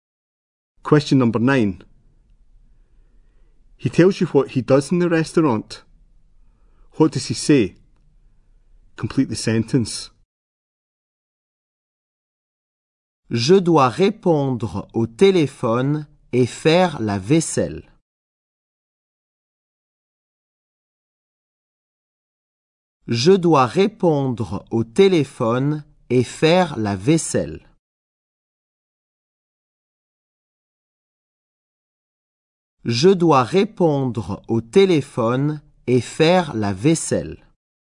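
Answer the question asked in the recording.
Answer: He answers the phone and does the washing up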